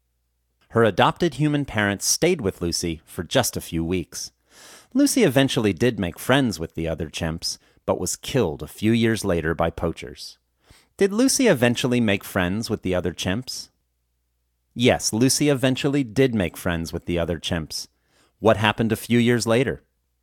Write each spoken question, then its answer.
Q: What happened a few years later?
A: She was killed a few years later by poachers.